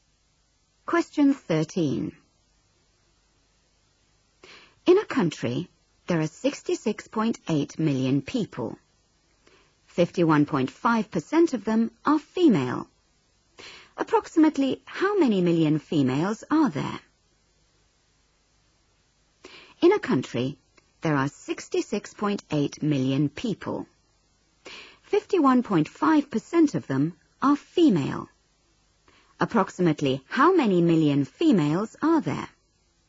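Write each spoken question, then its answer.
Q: Approximately how many million females are there?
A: about 34 million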